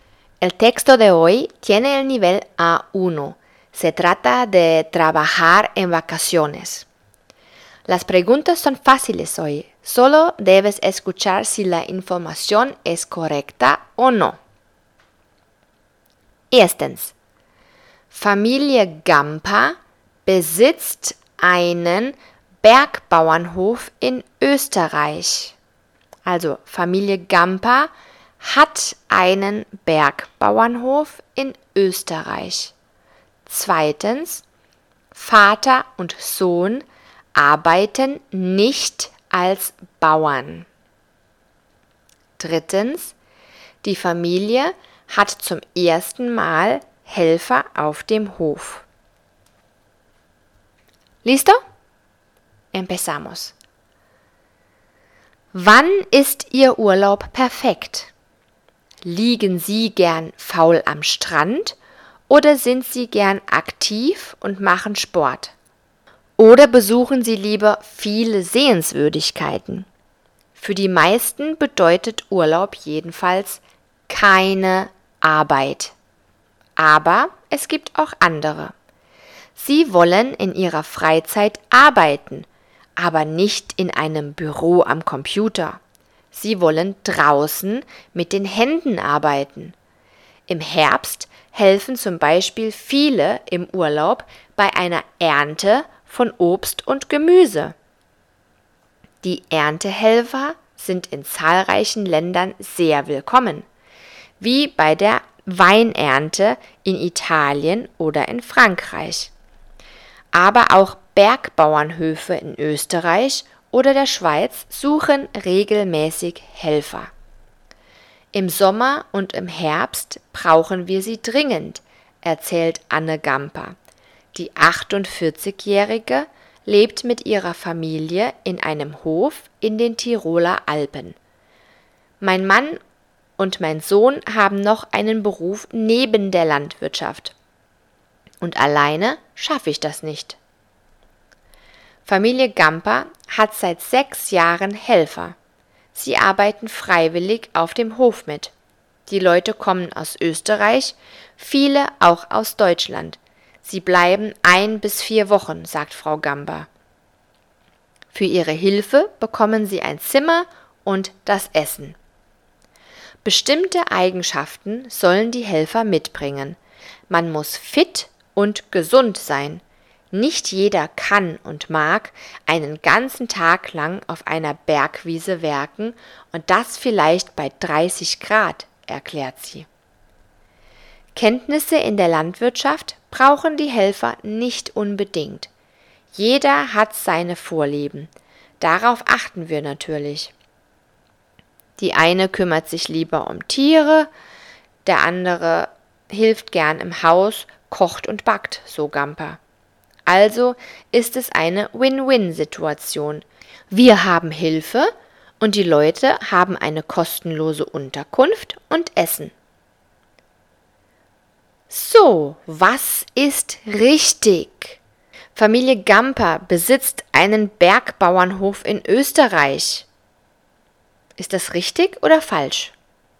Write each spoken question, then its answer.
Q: Familie Gampa besitzt einen Bergbauernhof in Österreich.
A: Das ist richtig.

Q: Vater und Sohn arbeiten nicht als Bauern.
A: Das ist falsch. Sie arbeiten als Bauern und etwas anderes.

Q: die Familie hat zum ersten Mal Helfer auf dem Hof.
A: Falsch.